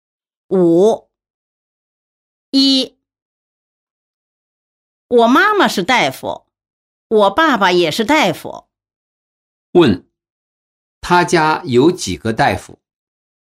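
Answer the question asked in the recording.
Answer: 两个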